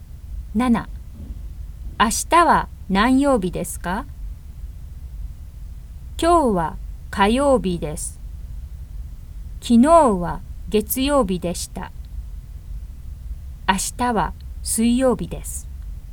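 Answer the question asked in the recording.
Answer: 水曜日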